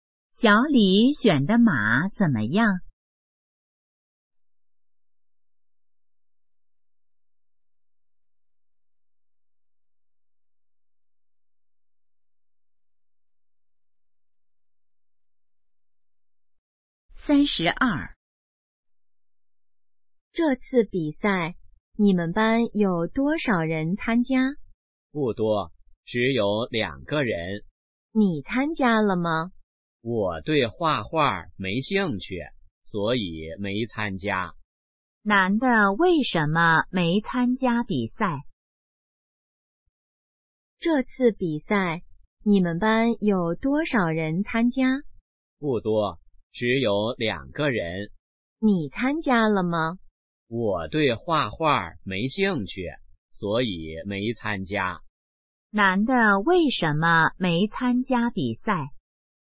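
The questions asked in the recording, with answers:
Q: 男的为什么没参加比赛?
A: 对画画没兴趣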